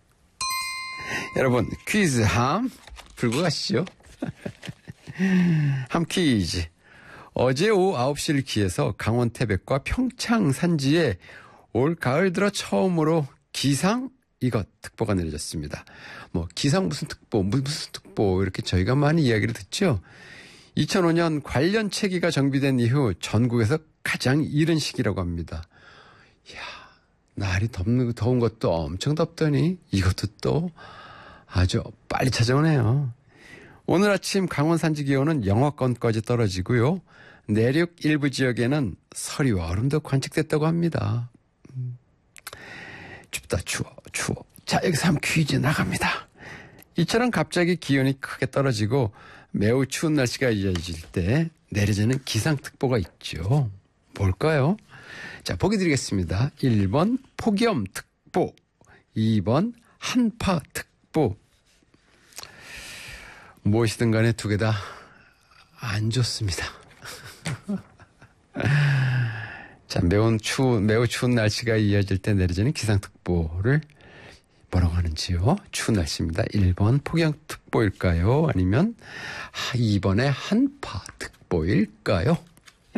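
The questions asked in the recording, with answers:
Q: 추운 날씨입니다. 1번 폭염특보일까요? 아니면 2번의 한파특보일까요?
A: 2: 한파특보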